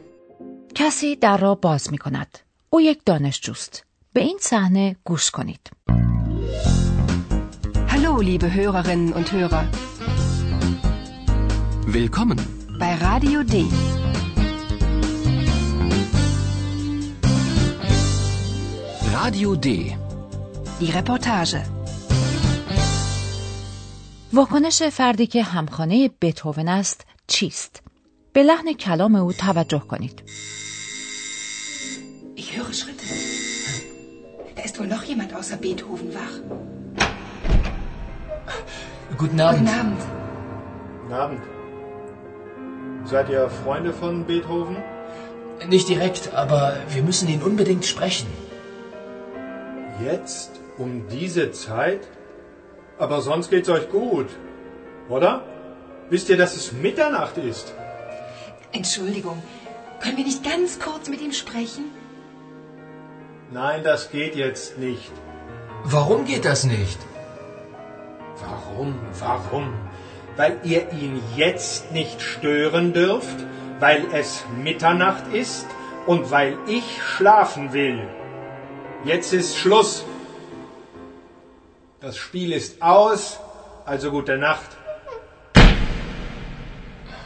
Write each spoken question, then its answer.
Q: واکنش فردی که همخانه بتوون است چیست؟ به لحن کلام او توجه کنید.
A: آیا متوجه شدید که خشم فرد همخانه بتوون لحظه به لحظه بیشتر می شود؟ در ابتدا او برخوردی دوستانه دارد